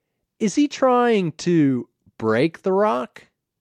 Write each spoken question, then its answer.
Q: Is he trying to break the rock?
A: Yes, he's trying to break the rock.